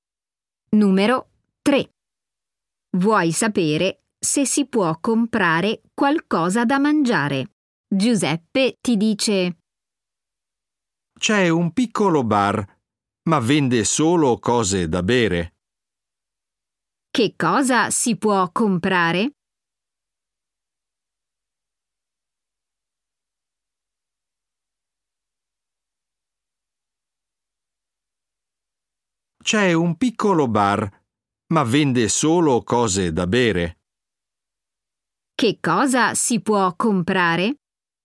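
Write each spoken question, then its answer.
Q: Che cosa si può comprare?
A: Solo cose da bere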